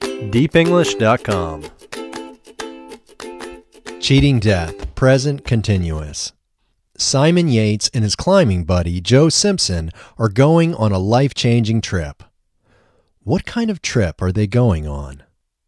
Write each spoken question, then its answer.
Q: What kind of trip are they going on?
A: They are going on a life-changing trip.